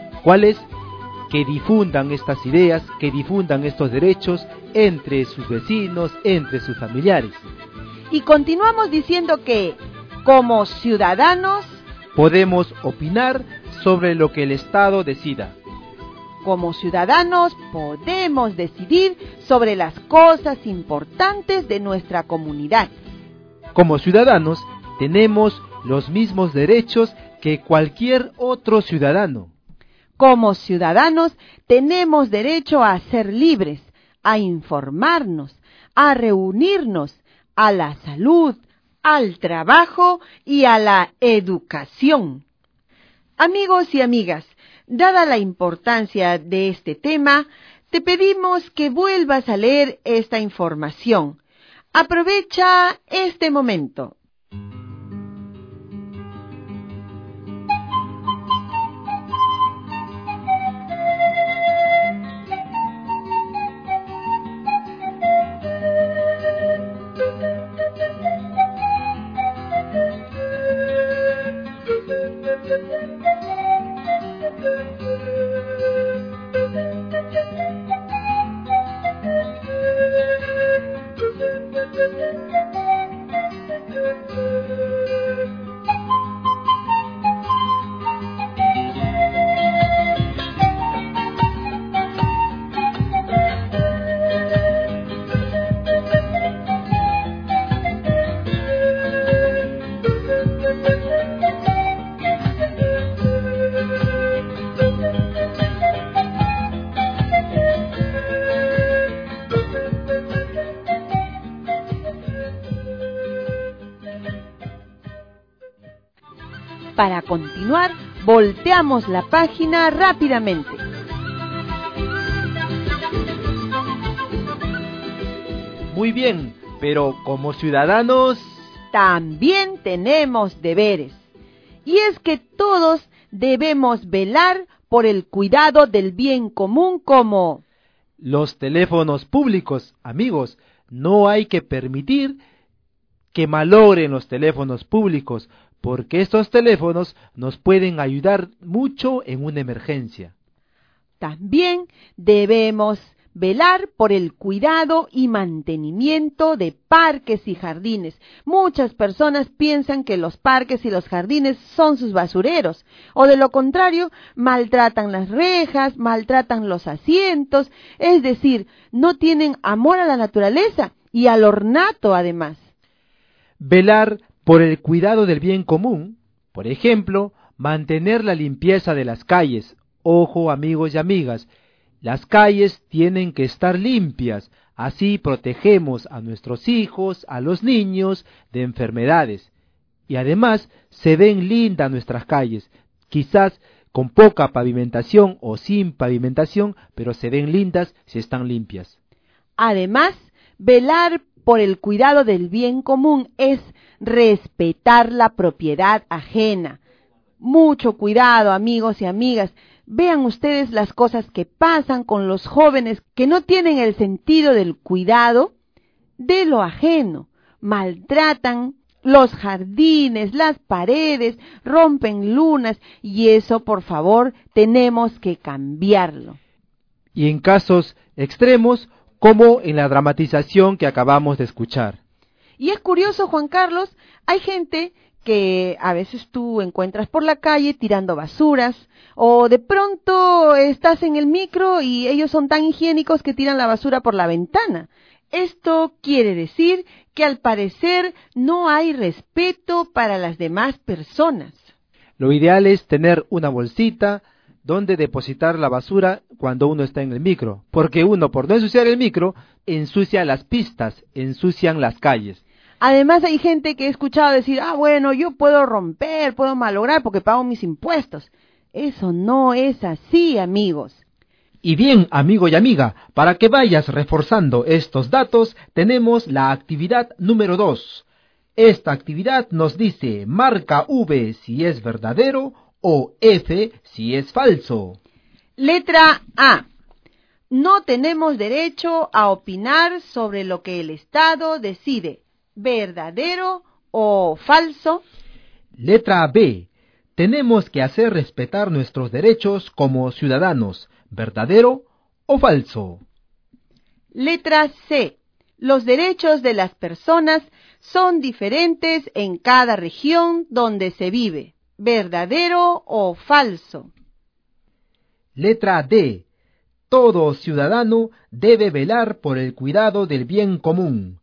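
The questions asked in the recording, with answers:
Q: Letra A. No tenemos derecho a opinar sobre lo que el Estado decide, verdadero o falso.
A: Falso

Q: Letra B. Tenemos que hacer respetar nuestros derechos como ciudadanos.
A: Verdadero

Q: Letra C. Los derechos de las personas son diferentes en cada región donde se vive.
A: Falso

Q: Letra D. Todo ciudadano debe velar por el cuidado del bien común.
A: Verdadero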